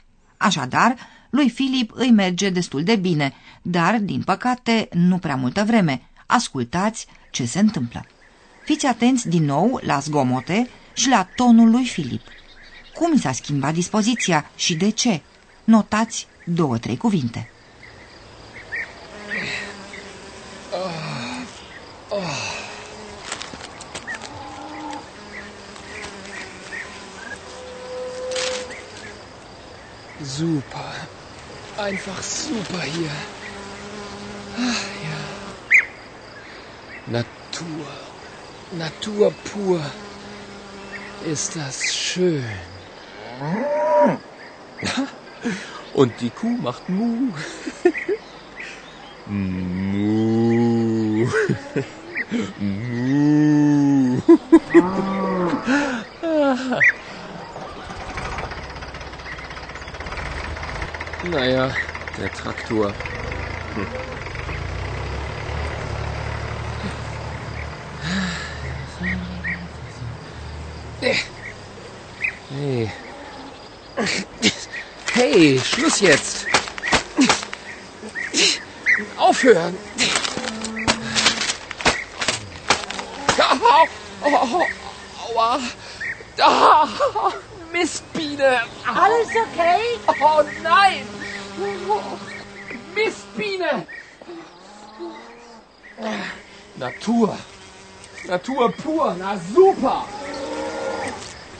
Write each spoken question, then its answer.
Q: Cum s-a schimbat dispoziția și de ce?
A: iar când Filip e înțepat de o albină, buna lui dispoziție se schimbă